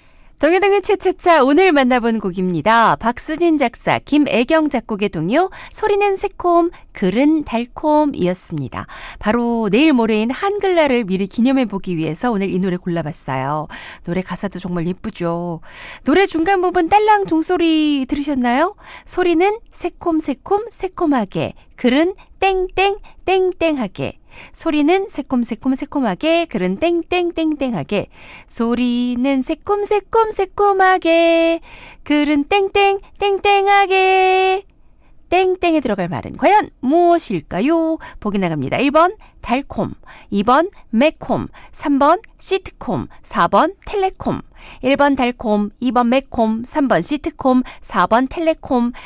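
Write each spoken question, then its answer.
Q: 땡땡에 들어갈 말은 과연 무엇일까요?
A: 1: 달콤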